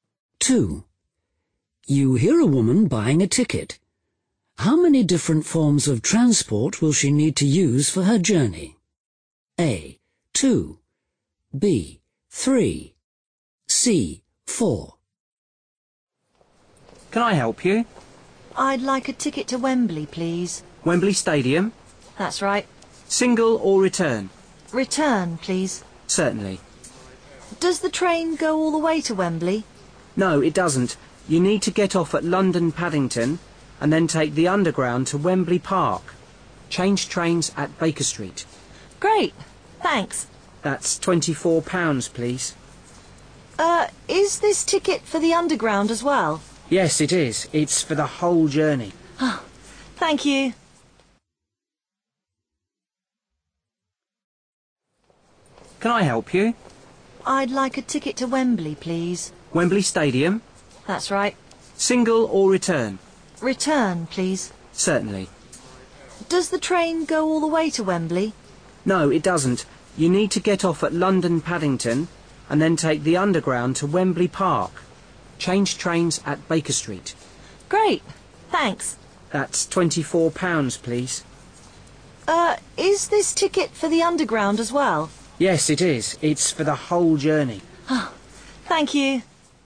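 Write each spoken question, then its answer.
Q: How many different forms of transport will she need to use for her journey?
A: A: 2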